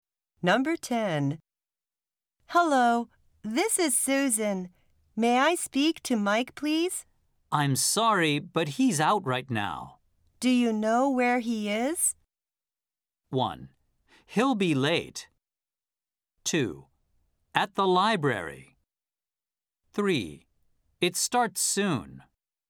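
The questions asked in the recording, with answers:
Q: Do you know where he is?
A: 2: At the library.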